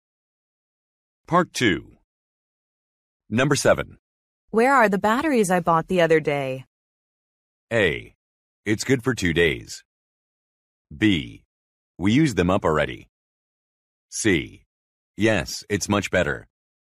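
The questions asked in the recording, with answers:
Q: Where are the batteries I bought the other day?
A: B: We used them up already.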